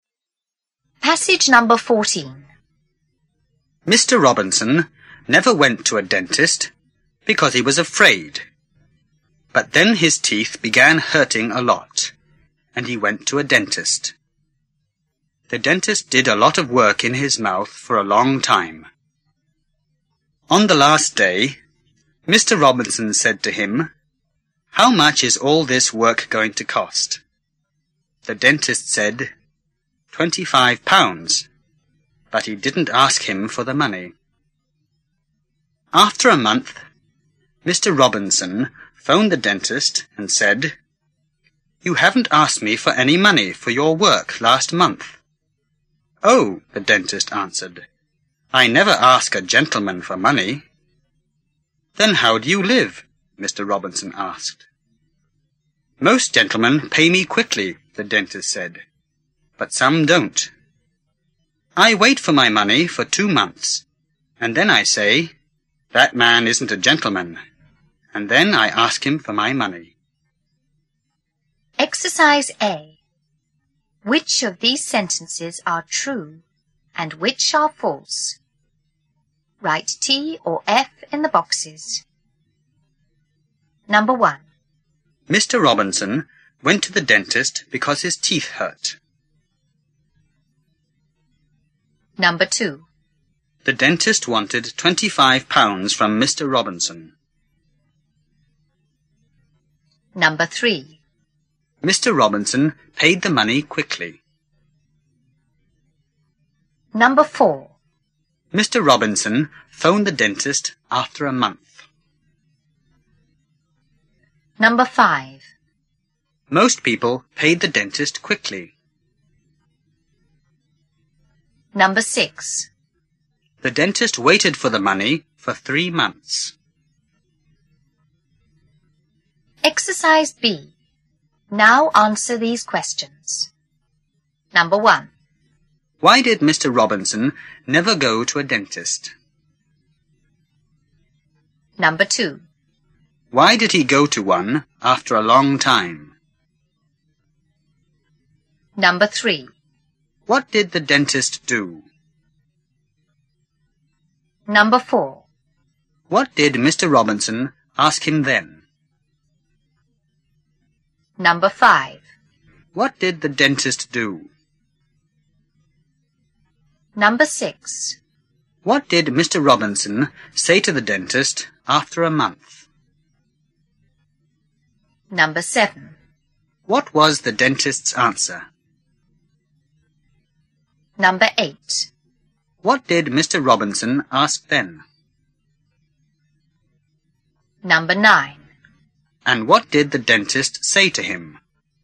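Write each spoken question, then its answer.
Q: Why did Mr. Robinson never go to a dentist?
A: Because he was afraid.

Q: Why did he go to one after a long time?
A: Because his teeth began hurting a lot.

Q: What did the dentist do?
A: He did a lot of work in his mouth for a long time.

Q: What did Mr. Robinson ask him then?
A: How much is all this work going to cost?

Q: What did the dentist do?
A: He said £25 but didn't ask him for the money.

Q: What did Mr. Robinson say to the dentist after a month?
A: You haven't asked me for any money for your work last month.

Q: What was the dentist's answer?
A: I never ask a gentleman for money.

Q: What did Mr. Robinson ask then?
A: Then how do you live?

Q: And what did the dentist say to him?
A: Most gentlemen pay quickly; after waiting two months he decides the man isn't a gentleman and asks for the money.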